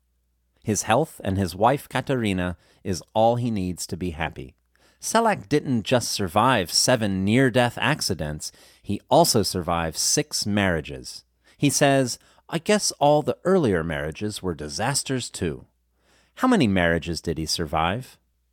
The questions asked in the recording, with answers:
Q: How many marriages did he survive?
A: He survived 6 marriages.